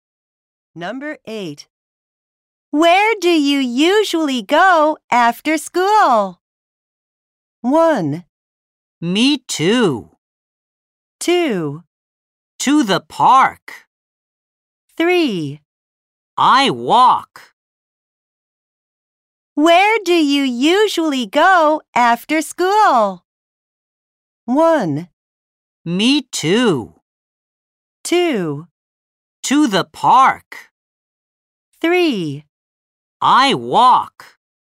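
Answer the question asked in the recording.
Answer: 2: To the park.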